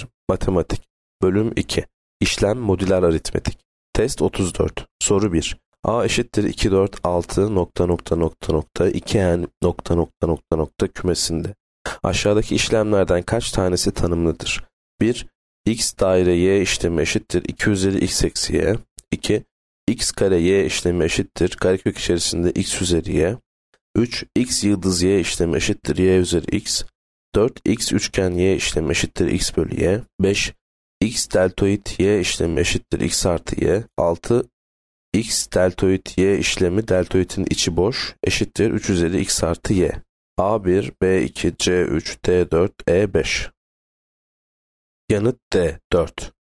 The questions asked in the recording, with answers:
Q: Aşağıdaki işlemlerden kaç tanesi tanımlıdır?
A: Yanıt D4.